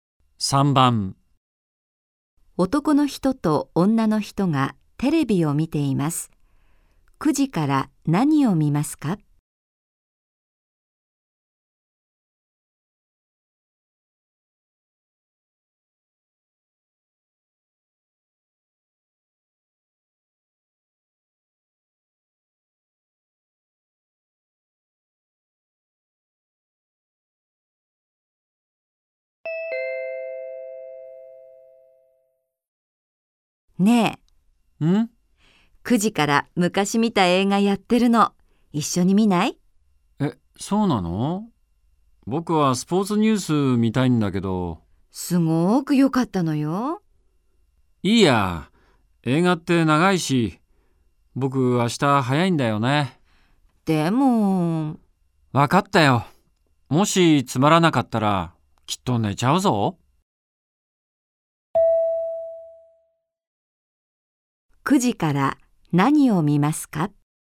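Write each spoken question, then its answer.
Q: 9時から何を見ますか?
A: 映画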